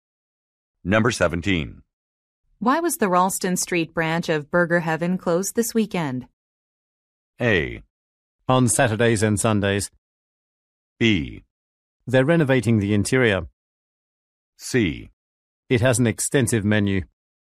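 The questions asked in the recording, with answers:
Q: Why was the Ralston Street branch of Burger Heaven closed this weekend?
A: B: They're renovating the interior.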